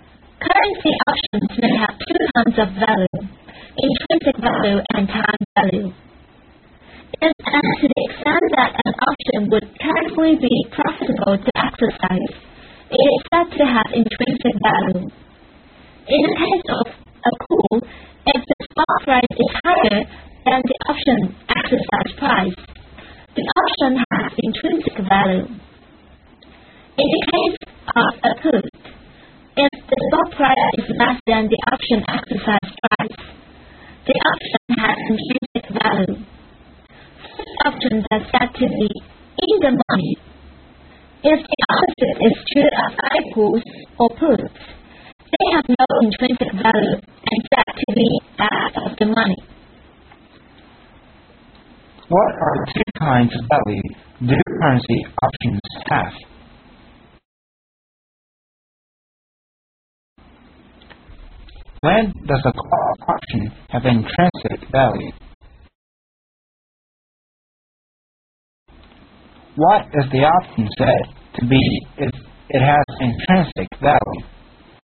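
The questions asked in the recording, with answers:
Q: What are the two kinds of value do currency options have?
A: Intrinsic value and time value

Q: When does a call option have intrinsic value?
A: When the stock price is higher than the option exercise price

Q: What is the option said to be if it has intrinsic value?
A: In the money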